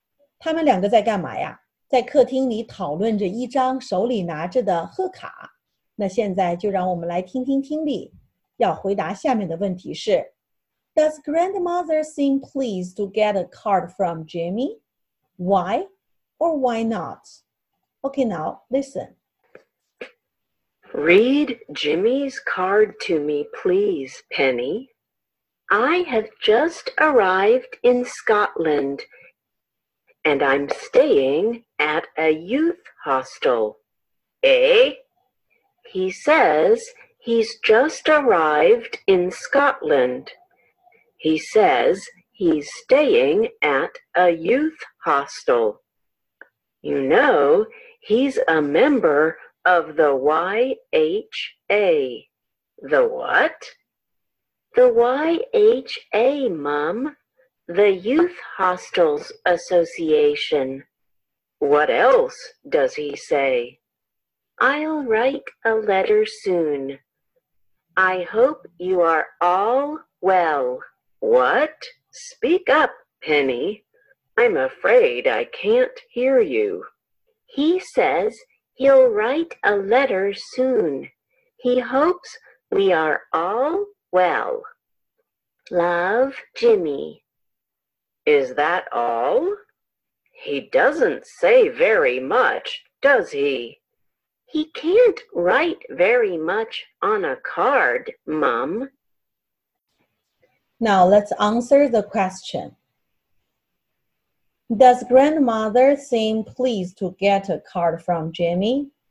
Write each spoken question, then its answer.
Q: Does grandmother seem pleased to get a card from Jimmy? Why or why not?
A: Not really. She doesn't think he writes enough.